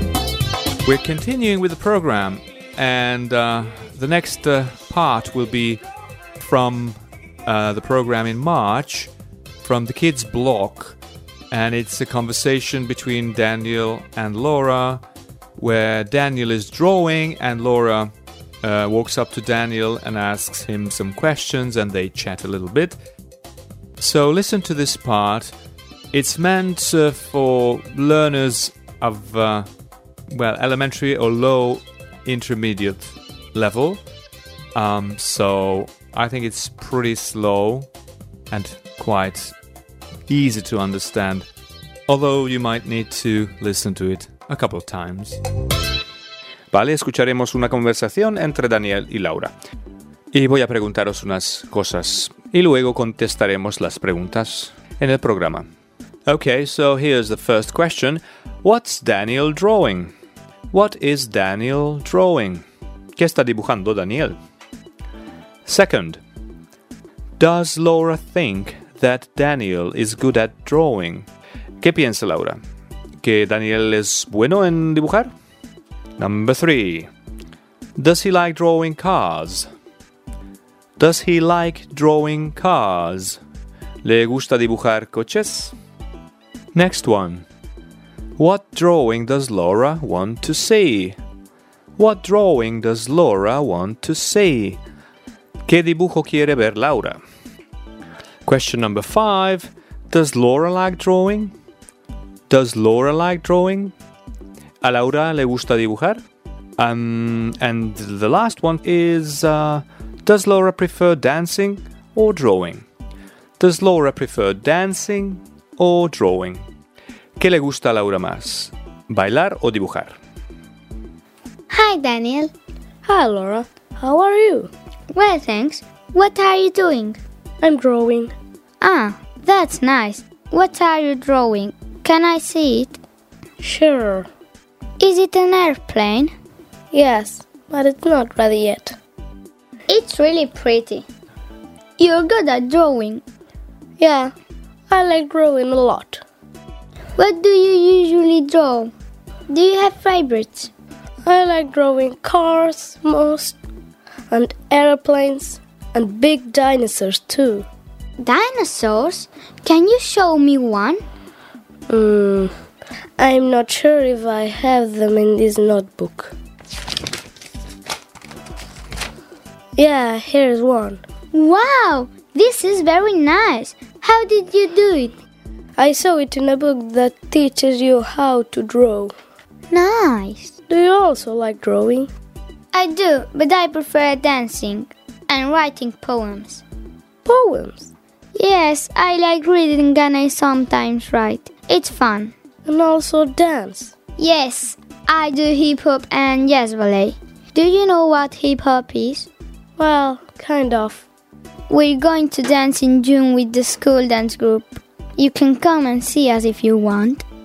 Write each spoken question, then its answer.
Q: What's Daniel drawing? What is Daniel drawing?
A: Yes, so Daniel is drawing an airplane.

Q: Second, does Laura think that Daniel is good at drawing?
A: Yes, she does. She says, it's really pretty.

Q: Number three, does he like drawing cars?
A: Yes, he does. He definitely does.

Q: What drawing does Laura want to see?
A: She wants to see a dinosaur drawing.

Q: Question number five. Does Laura like drawing?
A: Yes, she does. Laura likes drawing.

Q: Does Laura prefer dancing or drawing?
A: I do, but I prefer dancing.